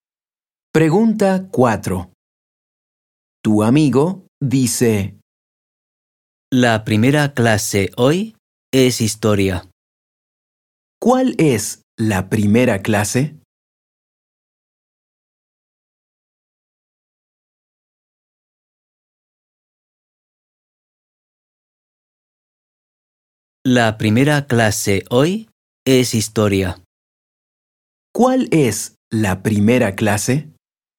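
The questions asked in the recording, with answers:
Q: ¿Cuál es la primera clase?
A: Historia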